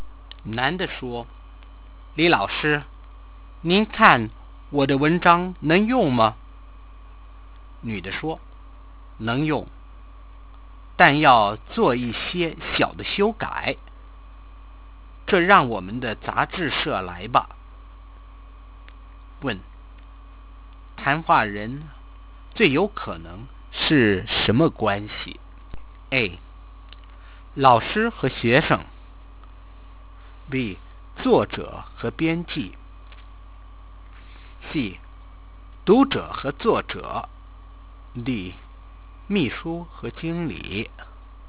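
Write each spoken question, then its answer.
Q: 谈话人最有可能是什么关系?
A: B: 作者和编辑。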